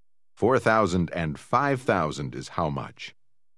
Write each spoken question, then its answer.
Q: 4,000 and 5,000 is how much?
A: 9,000.